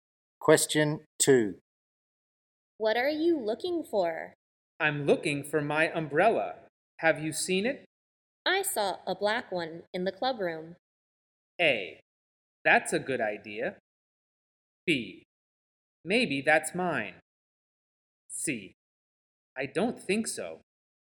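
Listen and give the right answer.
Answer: B: Maybe that's mine.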